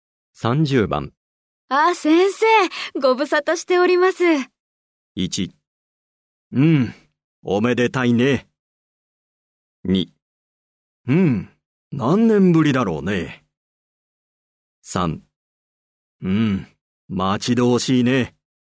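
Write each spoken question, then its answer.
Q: あ、先生、ご無沙汰しております。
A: 2: うん、何年ぶりだろうね。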